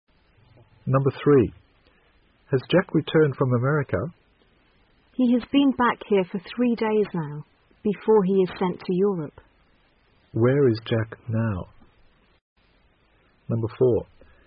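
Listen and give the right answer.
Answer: Back here at home (not yet in Europe)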